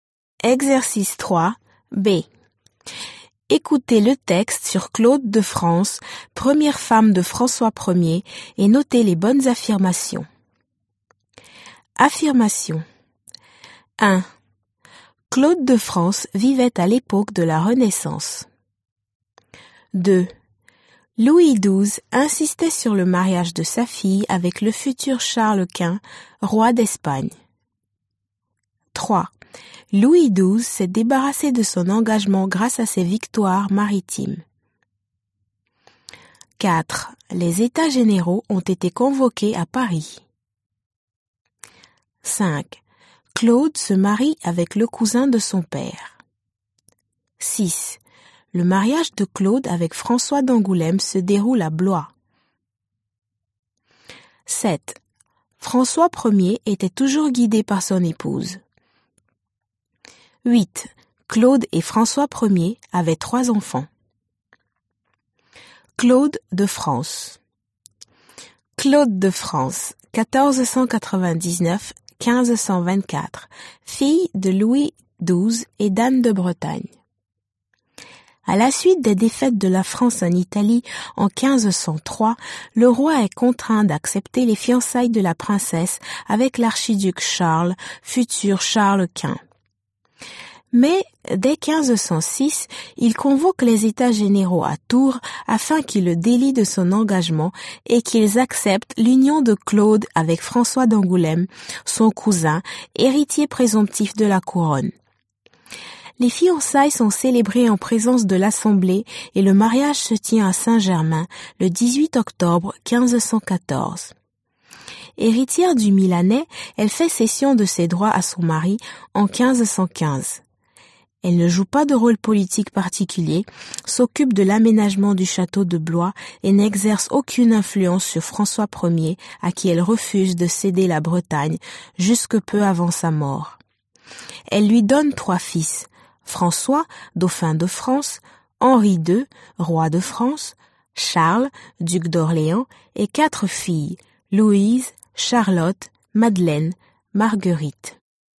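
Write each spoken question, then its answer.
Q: Louis XII insistait sur le mariage de sa fille avec le futur Charles Quint, roi d'Espagne.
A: Faux

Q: Louis XII s'est débarrassé de son engagement grâce à ses victoires maritimes.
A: Faux

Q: Les États généraux ont été convoqués à Paris.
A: Faux

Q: Le mariage de Claude avec François d'Angoulême se déroule à Blois.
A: Faux

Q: François Ier était toujours guidé par son épouse.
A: Faux

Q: Claude et François Ier avaient 3 enfants.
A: Faux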